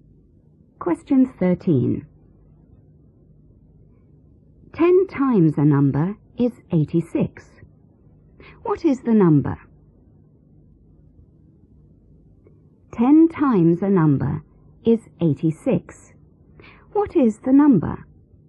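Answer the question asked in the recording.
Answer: 8.6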